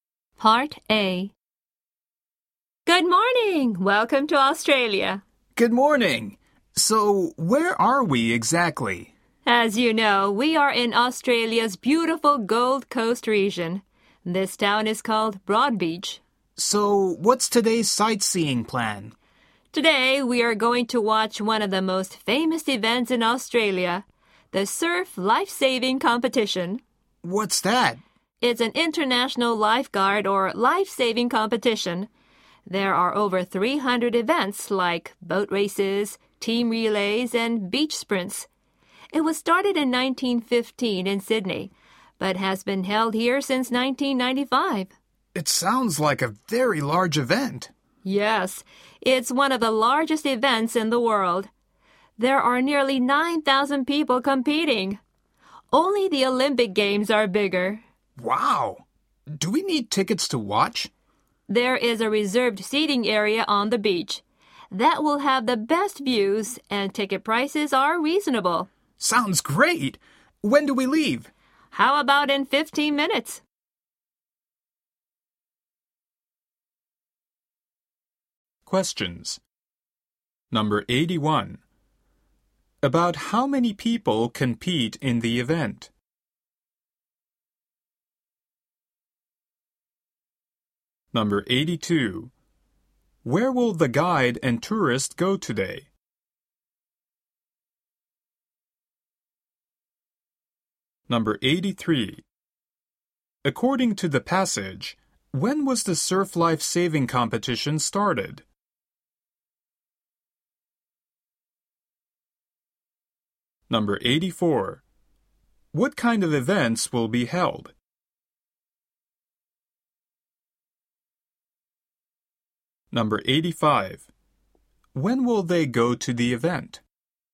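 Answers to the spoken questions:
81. Nearly 9,000
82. To the Surf Life-Saving Competition at Broadbeach
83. In 1915
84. Boat races, team relays and beach sprints
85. In 15 minutes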